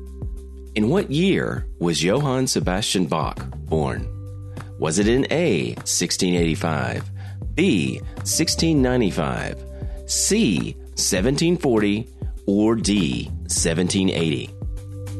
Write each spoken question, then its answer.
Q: In what year was Johann Sebastian Bach born?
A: The answer, A, 1685.